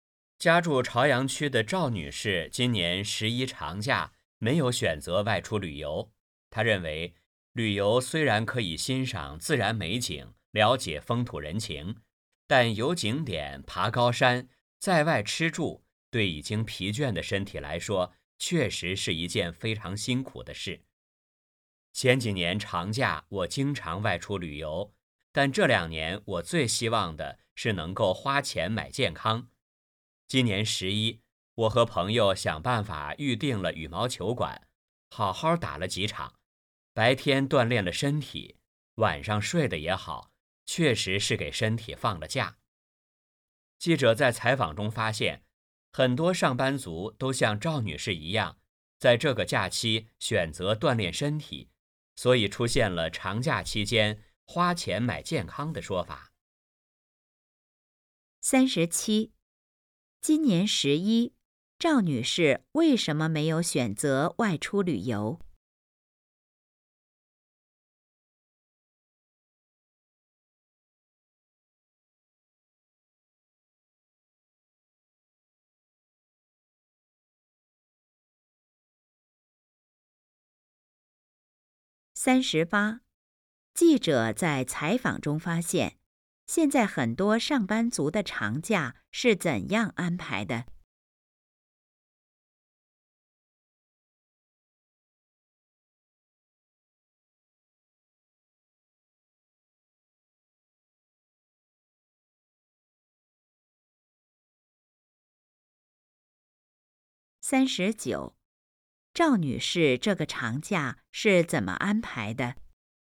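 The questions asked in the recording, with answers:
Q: 今年11,赵女士为什么没有选择外出旅游?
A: 旅游对疲倦的身体来说很辛苦

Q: 记者在采访中发现,现在很多上班族的长假是怎样安排的?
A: 锻炼身体

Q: 赵女士这个长假是怎么安排的?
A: 和朋友打羽毛球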